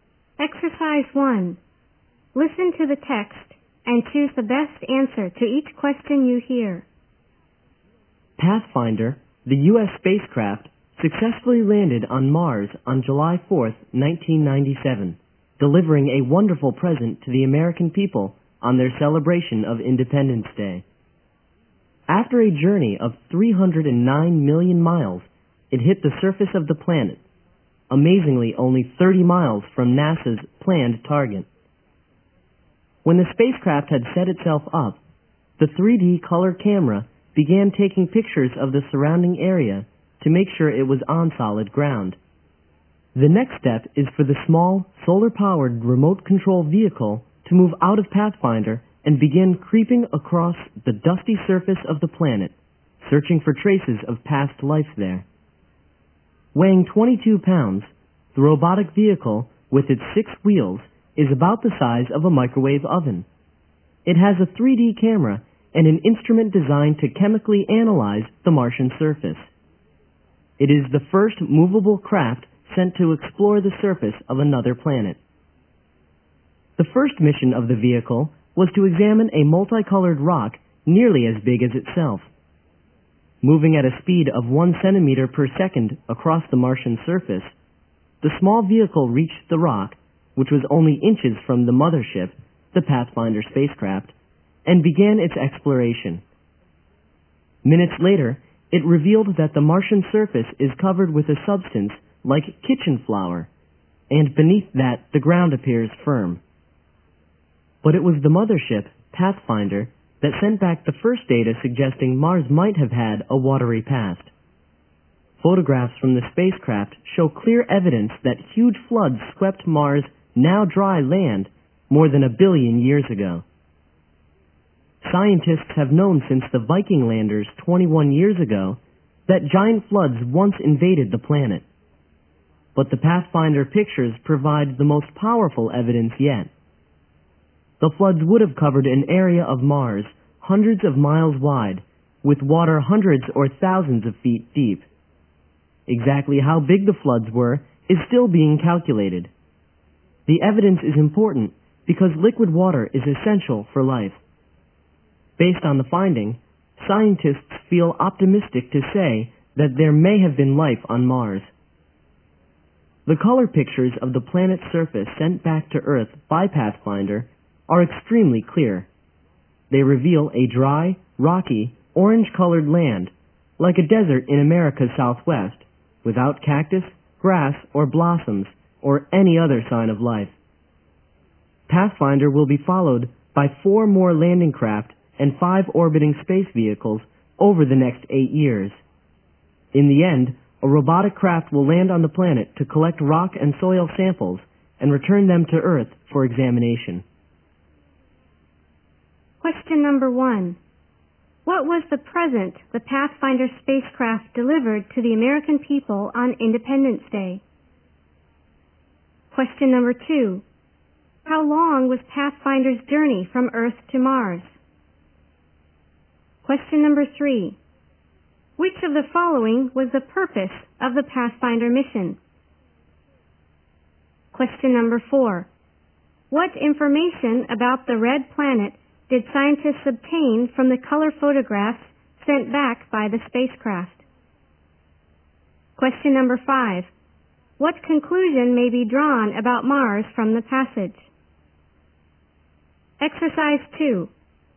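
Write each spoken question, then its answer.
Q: What was the present the Pathfinder spacecraft delivered to the American people on Independence Day?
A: Its successful landing on Mars

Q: How long was Pathfinder's journey from Earth to Mars?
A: 309 million miles

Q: What conclusion may be drawn about Mars from the passage?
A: There may have been life on Mars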